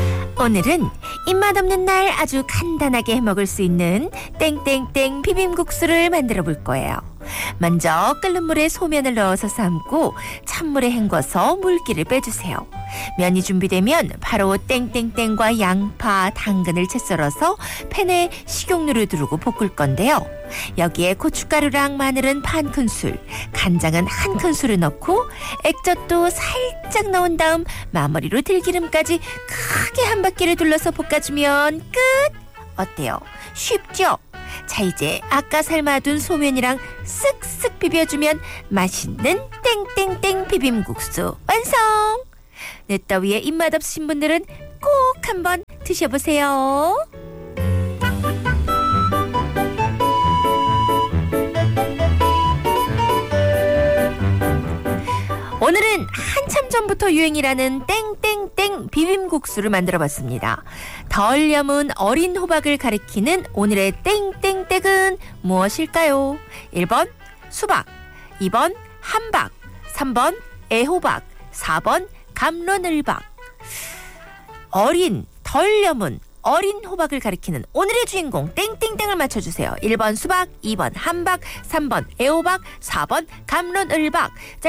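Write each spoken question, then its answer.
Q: 덜 염은 어린 호박을 가리키는 오늘의 땡땡땡은 무엇일까요?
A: 3: 애호박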